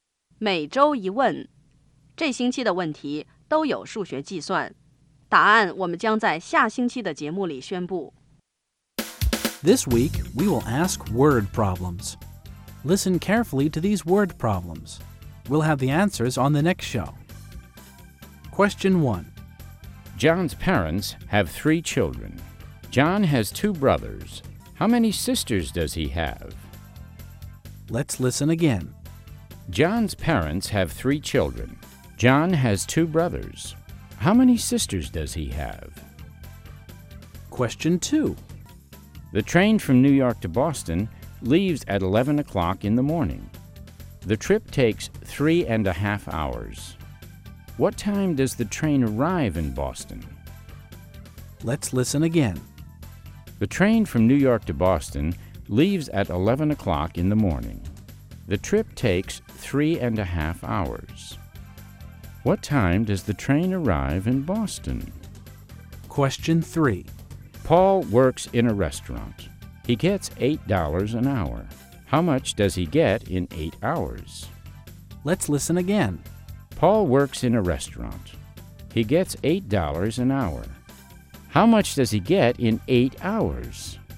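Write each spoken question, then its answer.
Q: John's parents have 3 children. John has 2 brothers. How many sisters does he have?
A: None (0 sisters)

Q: What time does the train arrive in Boston?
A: 2:30 in the afternoon

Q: How much does he get in 8 hours?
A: $64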